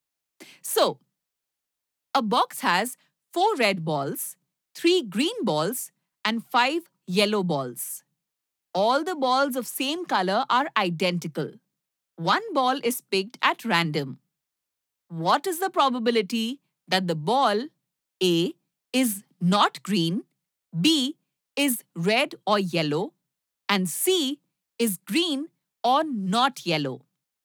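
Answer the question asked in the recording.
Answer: A: 3/4 (9/12), B: 3/4 (9/12), C: 7/12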